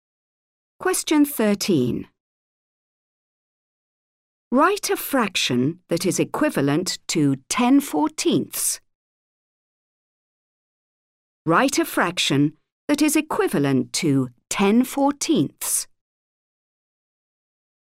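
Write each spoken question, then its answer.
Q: Write a fraction that is equivalent to 10/14.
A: 5/7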